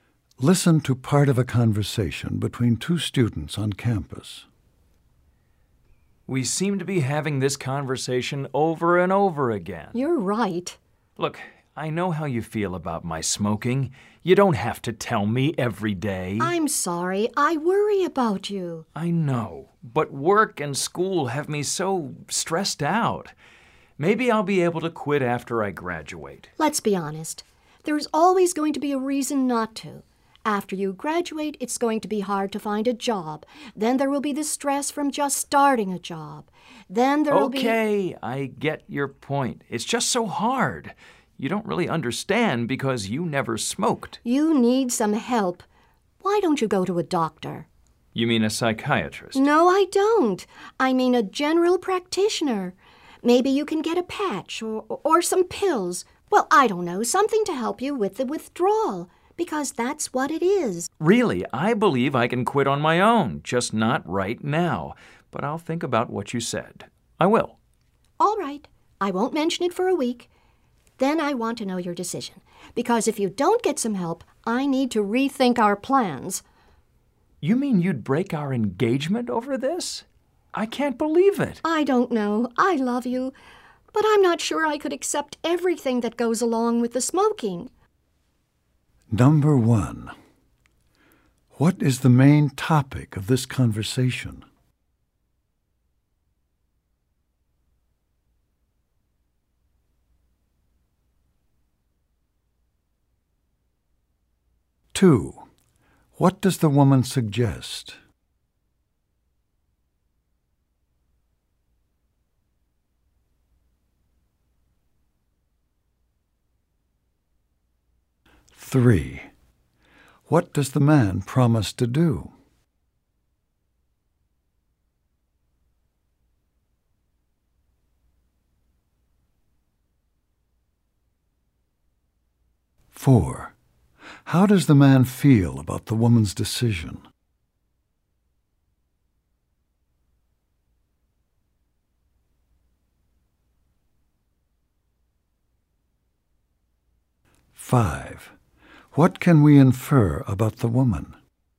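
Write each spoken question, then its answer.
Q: What is the main topic of this conversation?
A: The man's smoking and whether he will quit

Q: What does the woman suggest?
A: That he see a doctor (general practitioner) for help quitting

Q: What does the man promise to do?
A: Think about what she said

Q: How does the man feel about the woman's decision?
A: Shocked; he can't believe it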